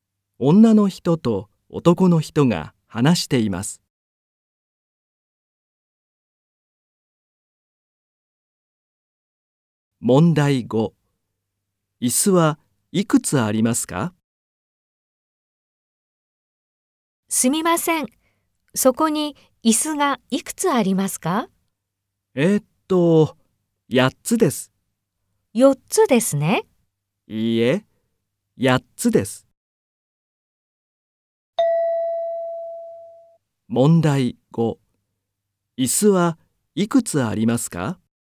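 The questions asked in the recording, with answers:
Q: 椅子はいくつありますか?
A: 8つ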